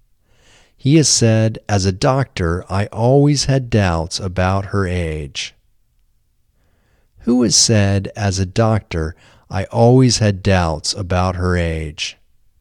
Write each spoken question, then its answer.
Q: Who has said, "As a doctor, I always had doubts about her age"?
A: Dr. Novoselov has said, "As a doctor, I always had doubts about her age."